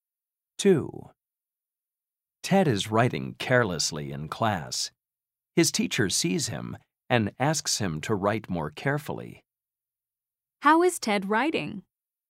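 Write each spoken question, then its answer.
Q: How is Ted writing?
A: carelessly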